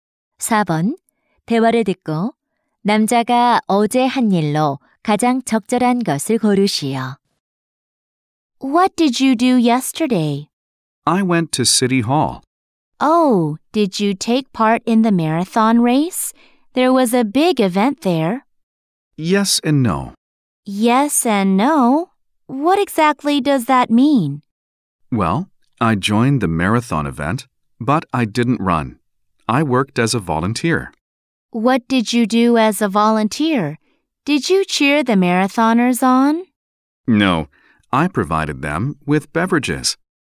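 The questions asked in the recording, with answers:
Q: 대화를 듣고 남자가 어제 한 일로 가장 적절한 것을 고르시오.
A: 마라톤 대회에서 음료 제공 자원봉사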